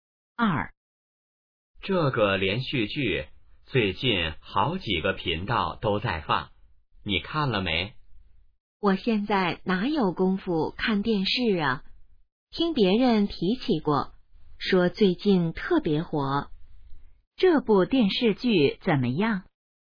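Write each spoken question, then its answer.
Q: 这部电视剧怎么样?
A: 最近特别火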